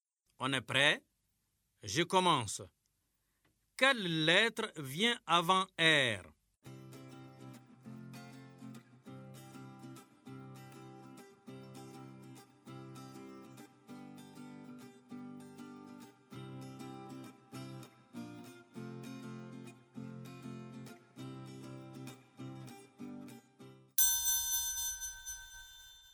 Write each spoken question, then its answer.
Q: Quelle lettre vient avant R?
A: Monsieur, c'est Q.